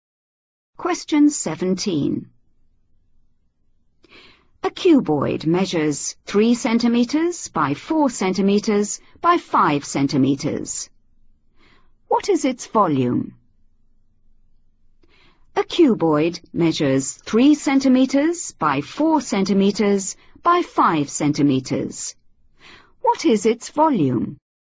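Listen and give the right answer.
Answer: 60 cubic centimetres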